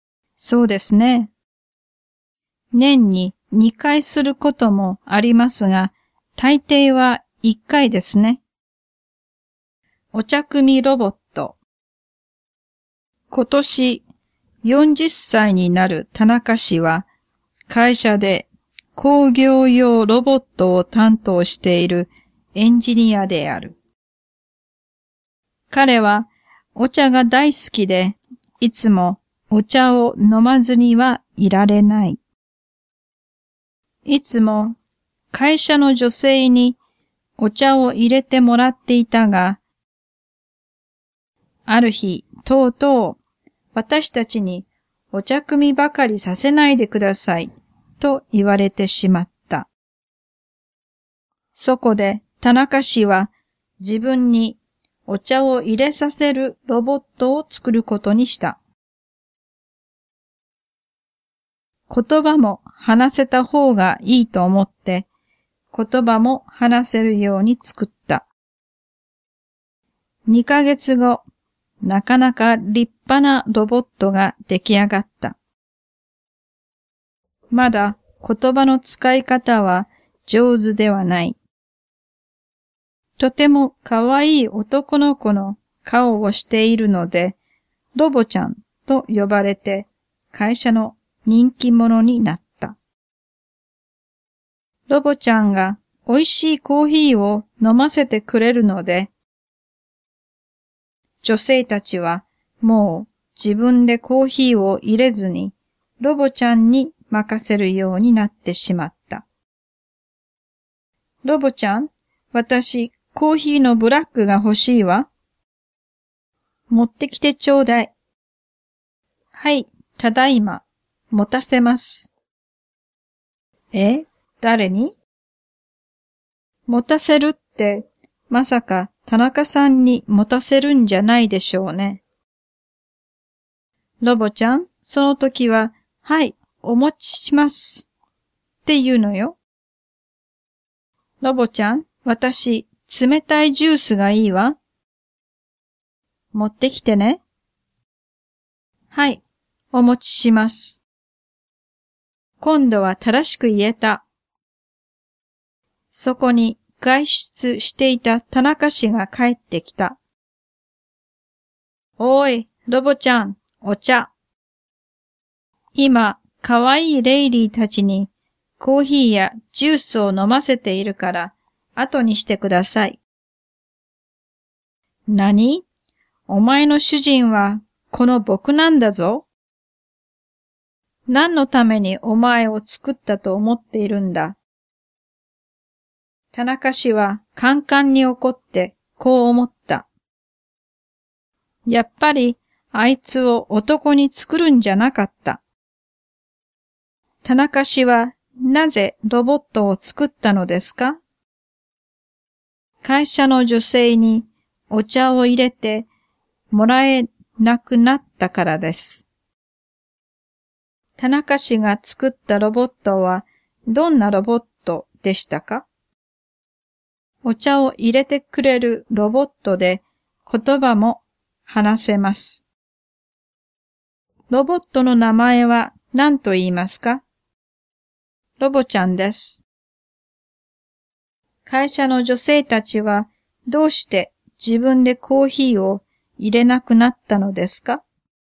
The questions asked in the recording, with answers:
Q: ロボットの名前は何と言いますか?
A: ロボちゃんです。